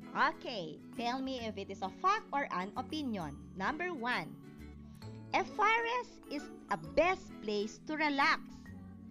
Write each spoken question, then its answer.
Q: a forest is a best place to relax.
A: Yes, it is an opinion.